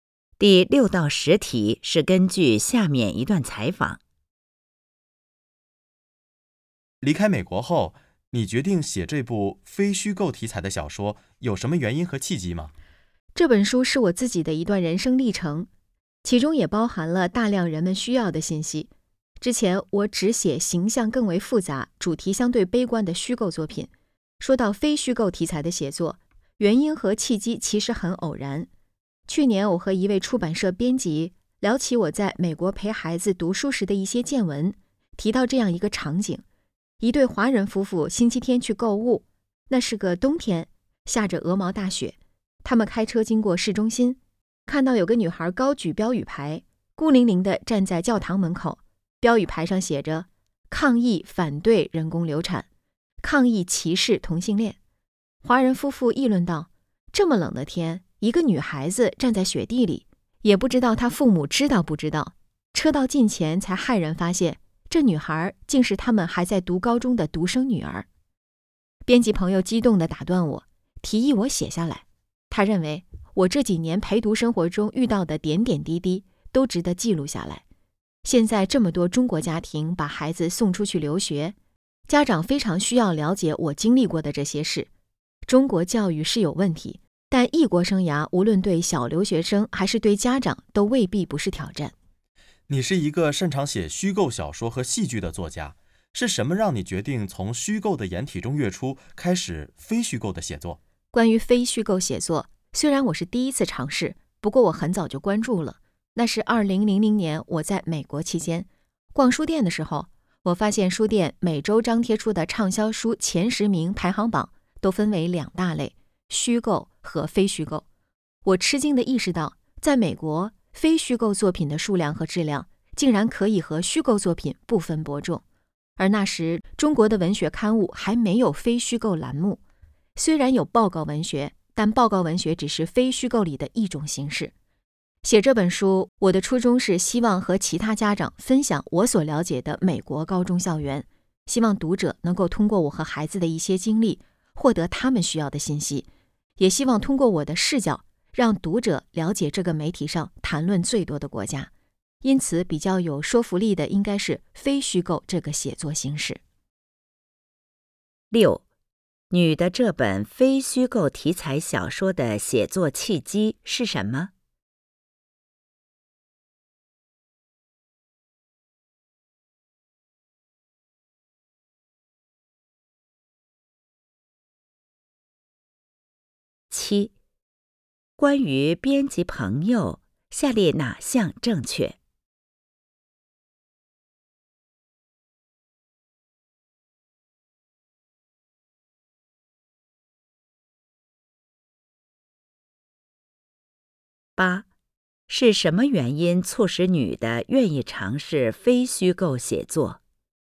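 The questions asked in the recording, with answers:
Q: 你的这本非虚构题材小说的写作契机是什么?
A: 她和出版社编辑聊起在美国陪孩子读书时的见闻,编辑提议她写下来

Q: 是什么原因促使女的愿意尝试非虚构写作?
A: 她在美国发现畅销书榜分虚构和非虚构两类,非虚构作品的数量和质量可以和虚构作品不分伯仲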